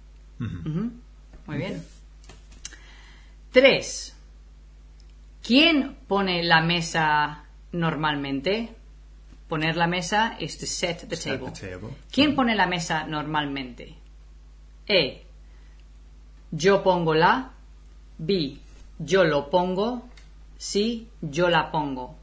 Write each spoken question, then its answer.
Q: ¿Quién pone la mesa normalmente?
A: Okay, so I would say yo la pongo.